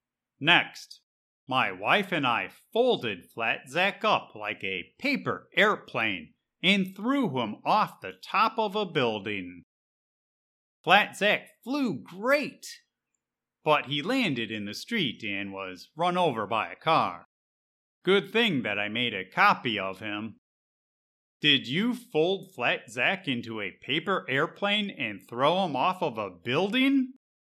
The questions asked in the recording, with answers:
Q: Did you fold Flat Zack into a paper airplane and throw him off of a building?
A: Yep. And Zack flew great.